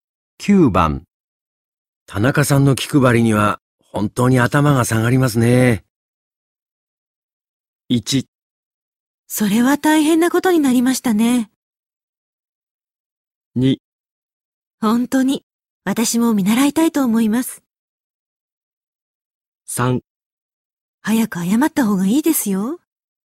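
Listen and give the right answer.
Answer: 2: 本当に、私も見習いたいと思います。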